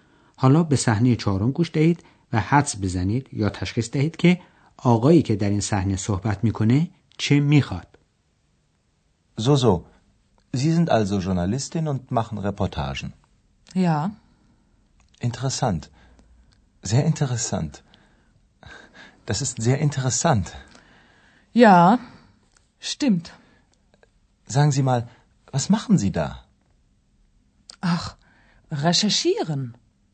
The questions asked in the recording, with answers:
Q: حدس بزنید یا تشخیص دهید که آقایی که در این سحنه صحبت می کنه چه می خواد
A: مردی جوان میخواست سر صحبت رو باز کنه ولی خانم حوصله نداشت.